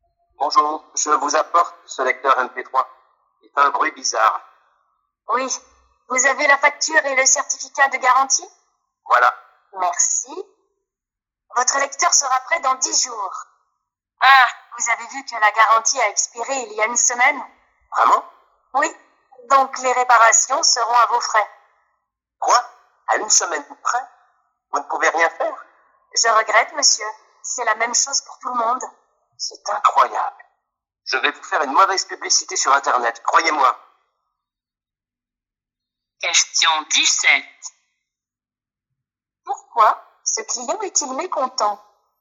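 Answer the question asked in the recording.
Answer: Parce que la garantie a expiré il y a une semaine et les réparations de son lecteur MP3 seront à ses frais.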